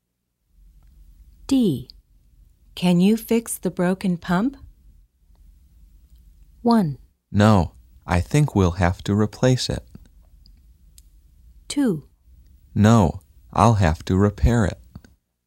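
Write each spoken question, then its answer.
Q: Can you fix the broken pump?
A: 1: No, I think we'll have to replace it.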